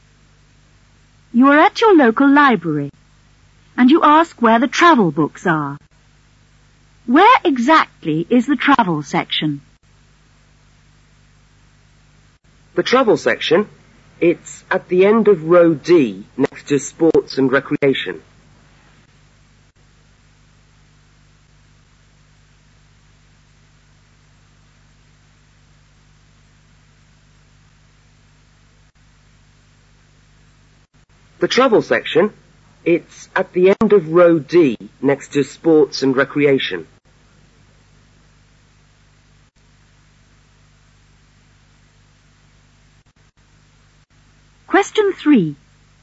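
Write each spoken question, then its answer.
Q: Where exactly is the travel section?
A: At the end of row D, next to sports and recreation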